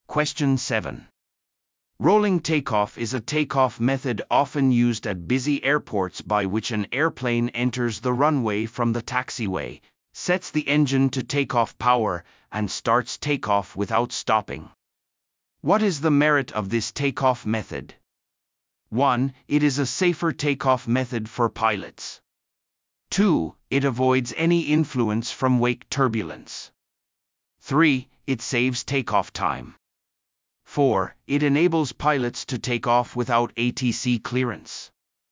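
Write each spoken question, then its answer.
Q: What is the merit of this takeoff method?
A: 3: It saves takeoff time.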